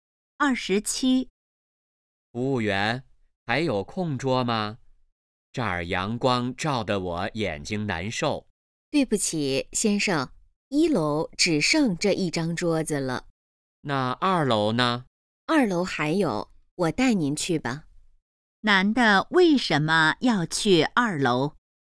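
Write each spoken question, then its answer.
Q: 男的为什么要去2楼?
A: 1楼阳光照得眼睛难受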